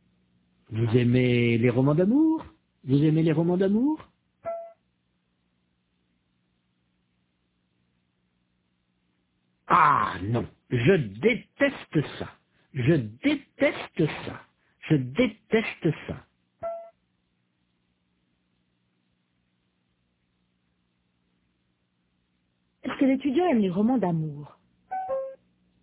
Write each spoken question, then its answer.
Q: Est-ce que l'étudiant aime les romans d'amour?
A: Non, il déteste ça.